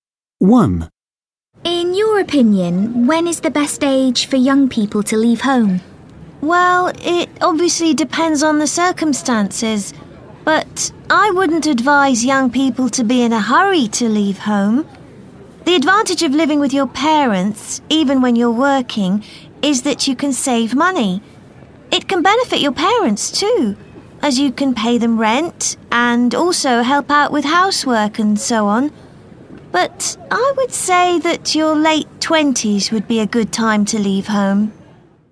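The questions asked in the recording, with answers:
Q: In your opinion, when is the best age for young people to leave home?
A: In their late 20s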